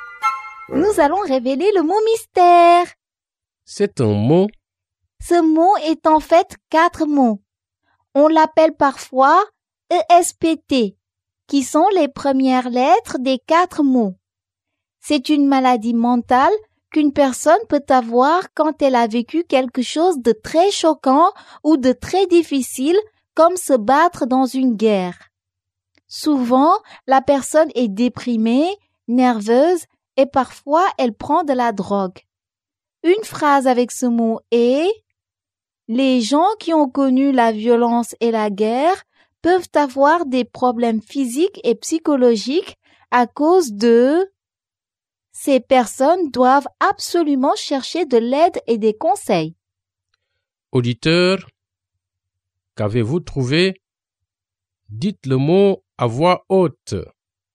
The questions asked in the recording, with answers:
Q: Auditeur, qu'avez-vous trouvé?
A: État de stress post-traumatique.